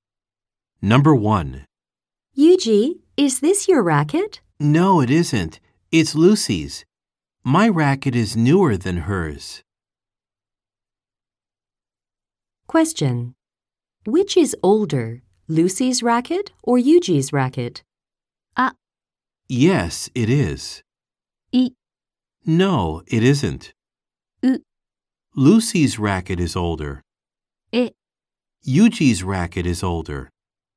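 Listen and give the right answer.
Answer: U: Lucy's racket is older.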